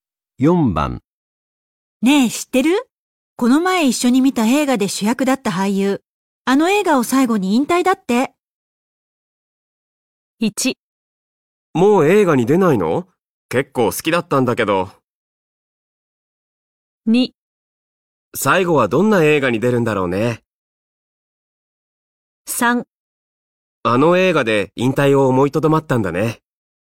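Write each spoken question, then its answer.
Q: ねえ、知ってるこの前一緒に見た映画で主役だった俳優。あの映画を最後に引退だって。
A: 1: もう映画に出ないの結構好きだったんだけど。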